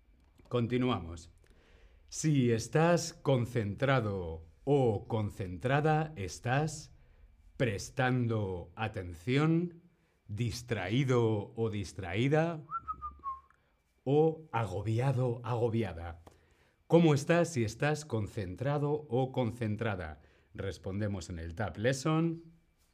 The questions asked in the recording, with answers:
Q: ¿Cómo estás si estás concentrado o concentrada?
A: Muy bien, correcto. Prestando atención